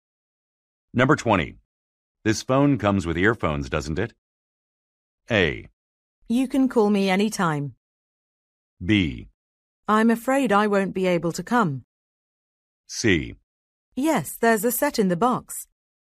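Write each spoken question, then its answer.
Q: This phone comes with earphones, doesn't it?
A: C: Yes, there's a set in the box.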